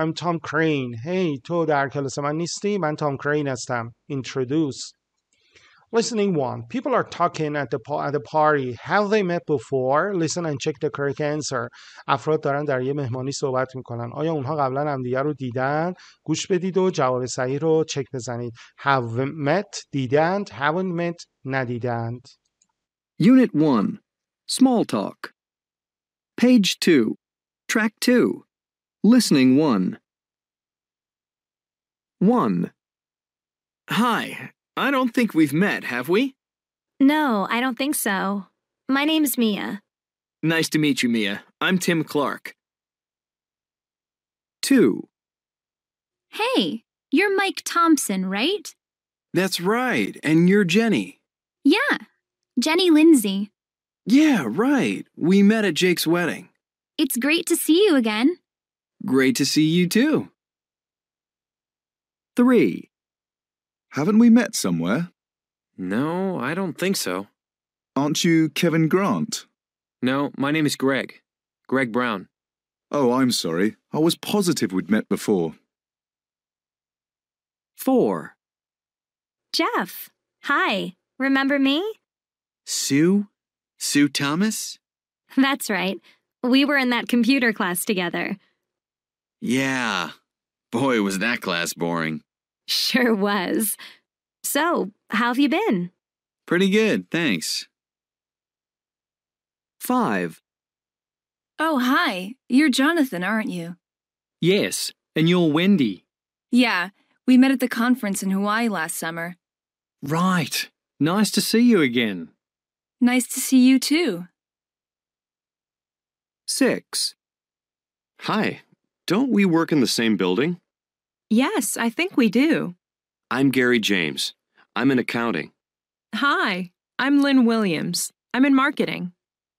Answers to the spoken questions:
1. One, haven't met.
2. Two, have met.
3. Three, haven't met.
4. Four, have met.
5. Five, have met.
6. Six, haven't met.